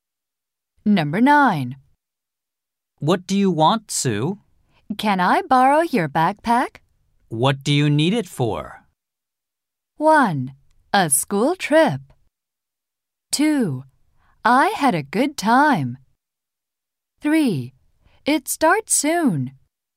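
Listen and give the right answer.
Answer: 1: A school trip.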